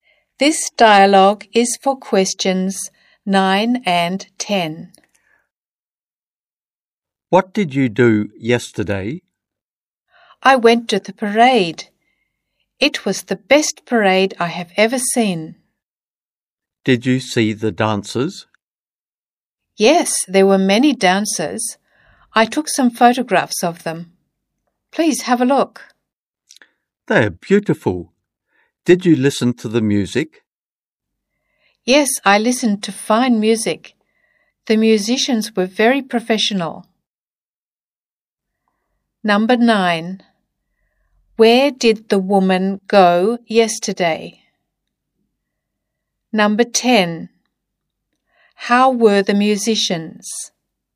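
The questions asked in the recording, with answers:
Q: Where did the woman go yesterday?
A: To the parade

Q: How were the musicians?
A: Very professional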